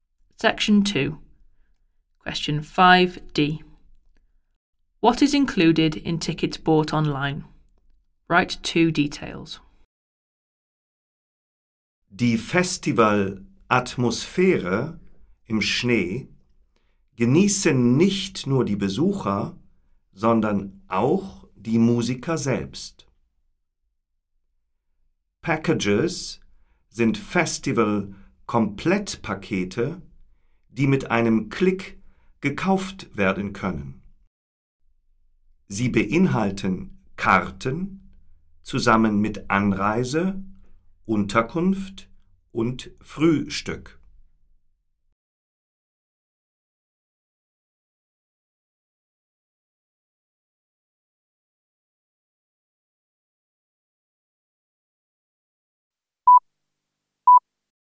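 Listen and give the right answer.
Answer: Travel, accommodation and breakfast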